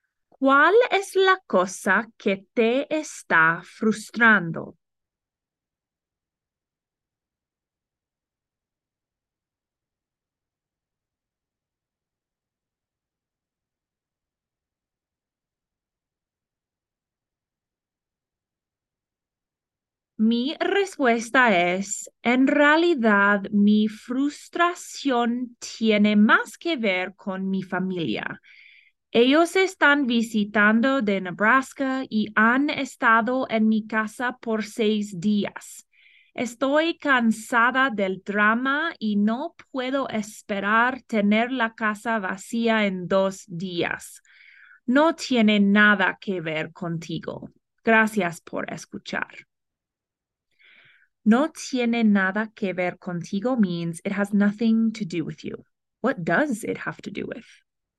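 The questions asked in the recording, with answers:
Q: What does it have to do with?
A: Her family visiting from Nebraska, who have been at her house for six days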